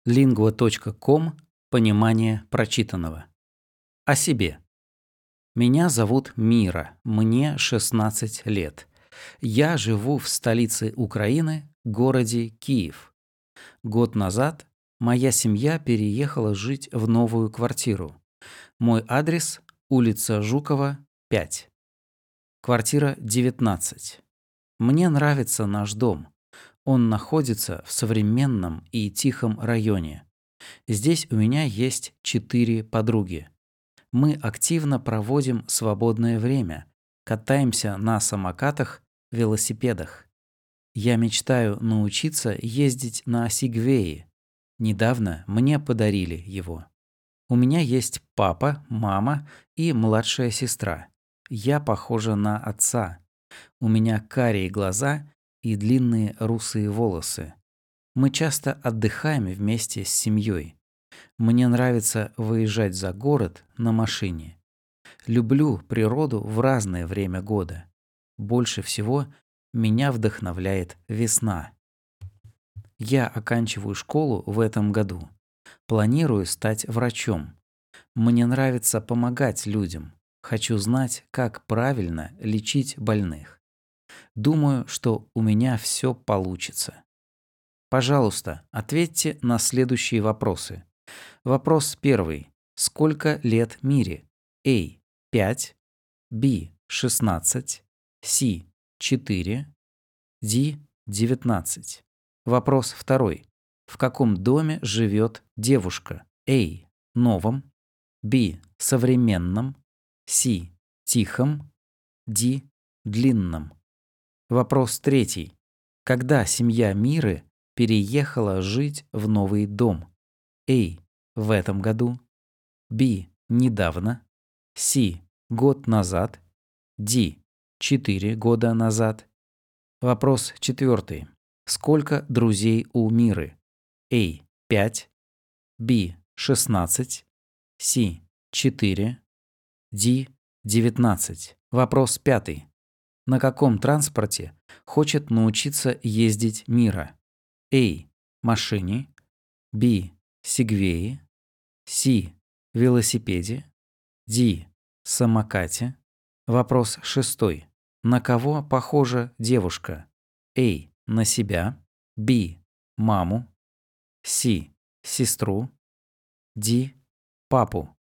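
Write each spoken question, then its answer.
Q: Сколько лет Мире?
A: B: 16

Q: Когда семья Миры переехала жить в новый дом?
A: C: Год назад

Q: Сколько друзей у Миры?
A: C: 4

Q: На каком транспорте хочет научиться ездить Мира?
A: B: Сегвее

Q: На кого похожа девушка?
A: D: Папу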